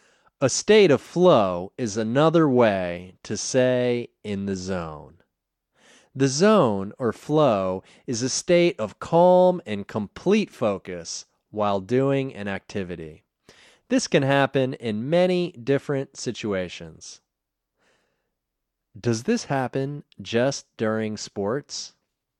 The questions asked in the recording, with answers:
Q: Does this happen just during sports?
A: No, it doesn't just happen during sports.